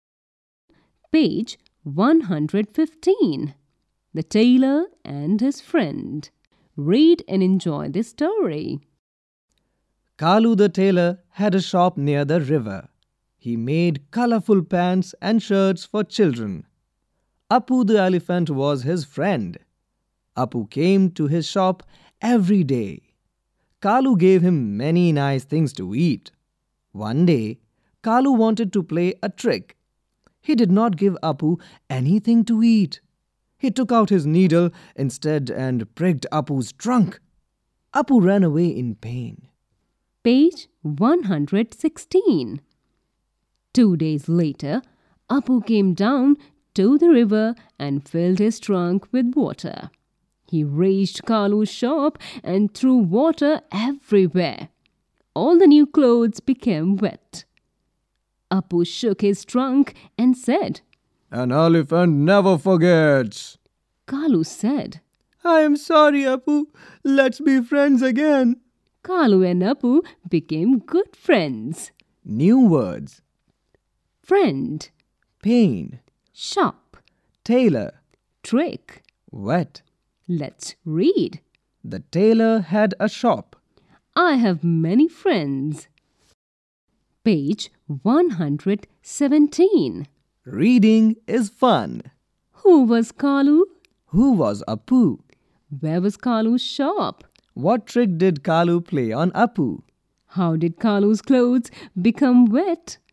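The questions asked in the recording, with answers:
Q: Who was Kalu?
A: A tailor

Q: Who was Apu?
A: An elephant, Kalu's friend

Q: Where was Kalu's shop?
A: Near the river

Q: What trick did Kalu play on Apu?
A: He gave him nothing to eat and pricked his trunk with a needle

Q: How did Kalu's clothes become wet?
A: Apu filled his trunk with river water and threw it everywhere in the shop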